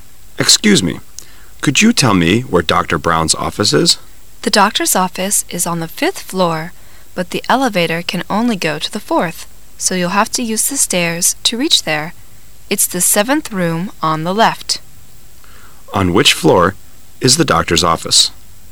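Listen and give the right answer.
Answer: The 5th floor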